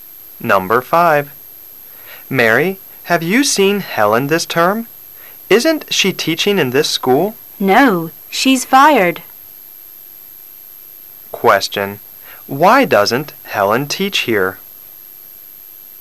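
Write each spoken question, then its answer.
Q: Why doesn't Helen teach here?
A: She was fired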